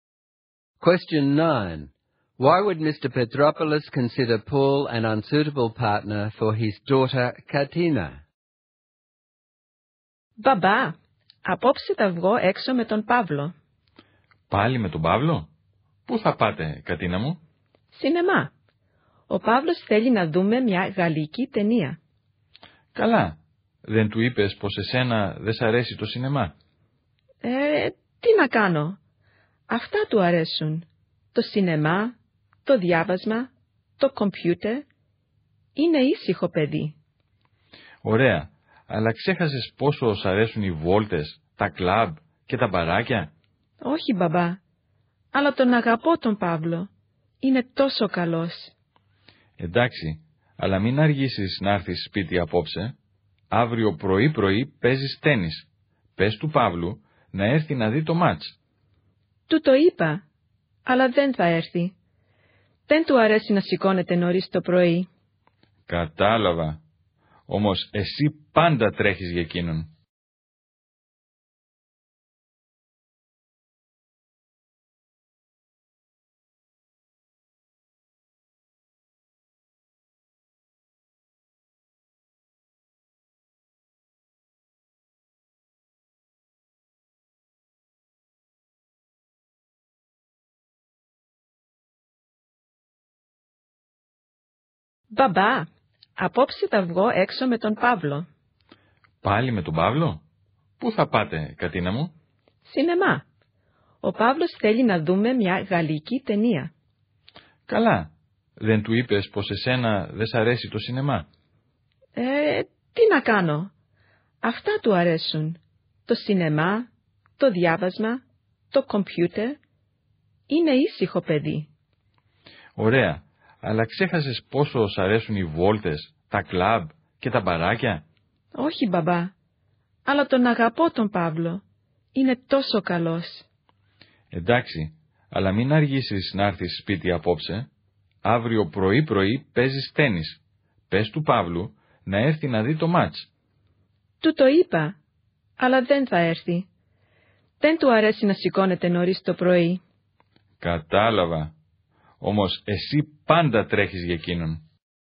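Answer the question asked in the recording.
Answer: Their interests don't match: Paul is quiet and likes cinema, reading and computers, while Katina likes going out to clubs and bars and plays sport; he won't get up early to watch her tennis match, yet she always does things for him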